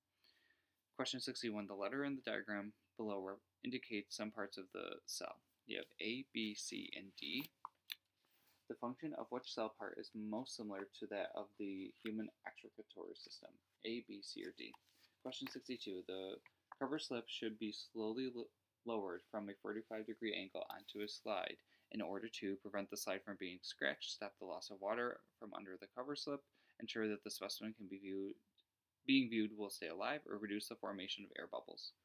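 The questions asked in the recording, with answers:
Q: The Cover slip should be slowly lowered from a 45-degree angle onto a slide.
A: reduce the formation of air bubbles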